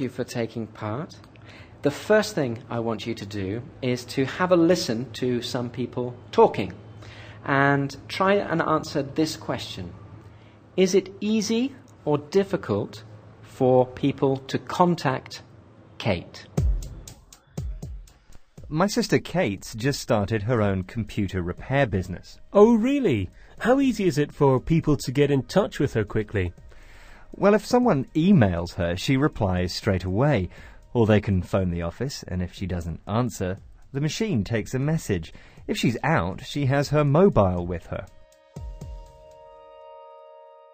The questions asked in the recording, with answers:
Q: Is it easy or difficult for people to contact Kate?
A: Okay, yes, it's easy for people to contact Kate.